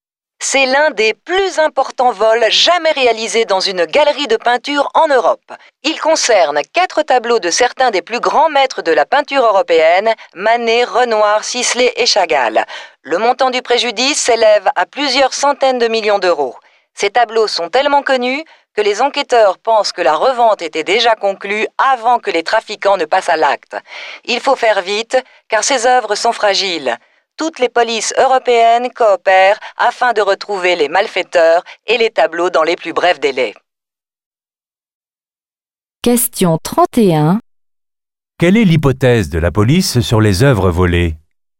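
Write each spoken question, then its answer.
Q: Quelle est l'hypothèse de la police sur les œuvres volées ?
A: Elles étaient déjà revendues avant le vol.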